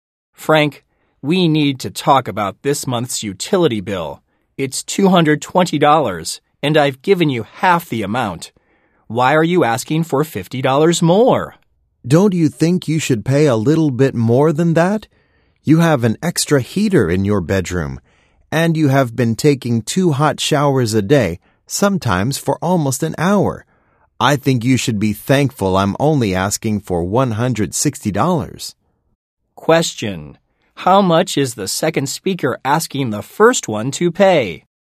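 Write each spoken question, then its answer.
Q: how much is the second speaker asking the first one to pay?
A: $160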